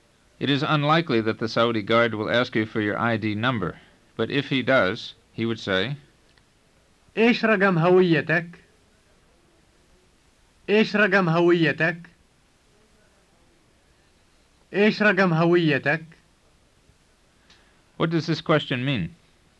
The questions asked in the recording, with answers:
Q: What does this question mean?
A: It means, what is your ID number?